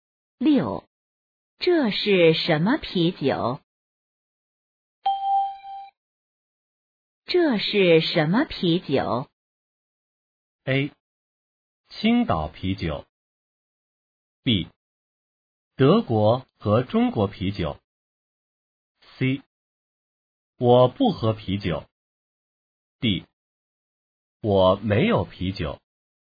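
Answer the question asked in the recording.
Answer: A: 青岛啤酒。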